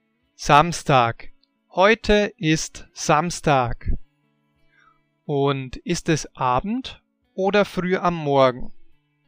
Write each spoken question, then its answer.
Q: Und ist es Abend oder früh am Morgen?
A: Es ist Abend.